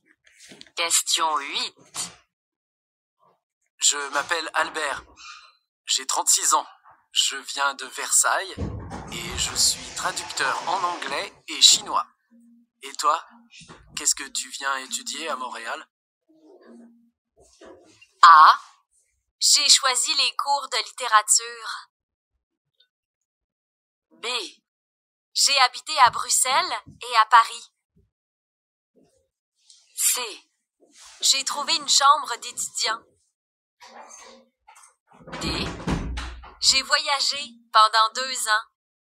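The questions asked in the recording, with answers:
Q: Et toi, qu'est-ce que tu viens étudier à Montréal?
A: A: J'ai choisi les cours de littérature.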